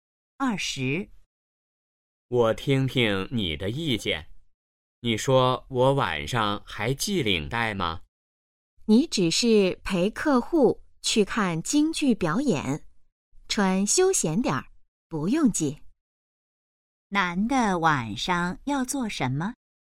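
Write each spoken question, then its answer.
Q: 男的晚上要做什么?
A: 陪客户看京剧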